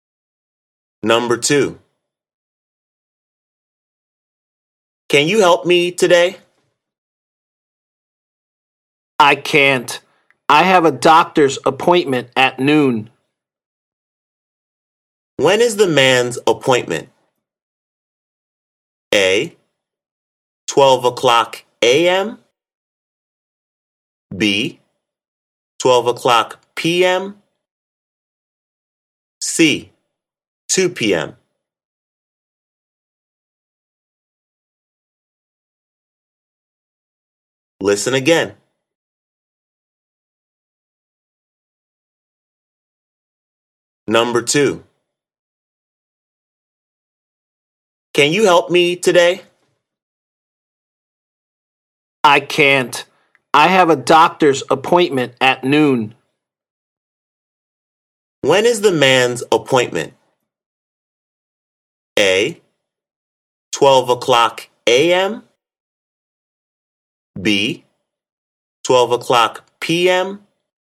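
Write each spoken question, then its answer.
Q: When is the man's appointment?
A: B: 12:00 p.m.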